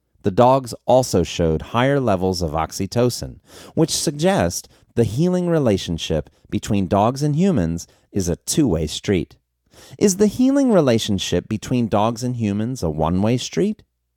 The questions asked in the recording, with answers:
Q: Is the healing relationship between dogs and humans a one-way street?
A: No, the healing relationship between dogs and humans isn't a one-way street.